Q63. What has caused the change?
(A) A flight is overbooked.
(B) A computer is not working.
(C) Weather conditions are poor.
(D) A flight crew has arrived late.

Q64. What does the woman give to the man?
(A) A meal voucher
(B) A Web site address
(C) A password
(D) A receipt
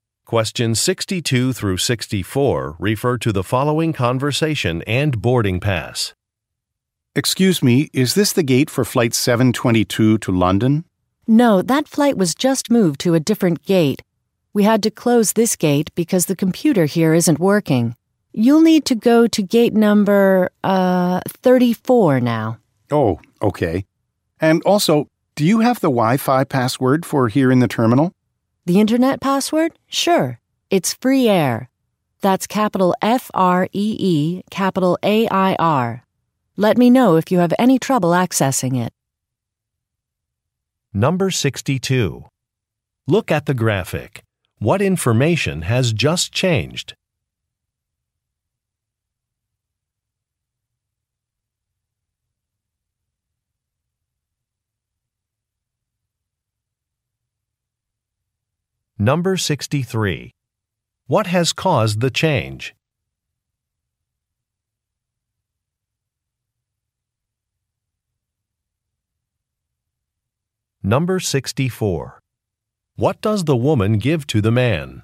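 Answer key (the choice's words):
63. A computer is not working.
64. A password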